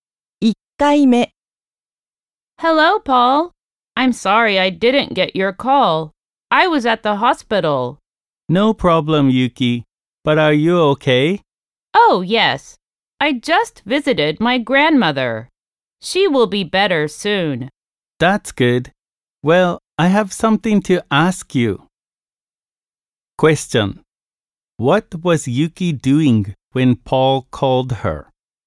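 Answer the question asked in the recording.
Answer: Visiting her grandmother at the hospital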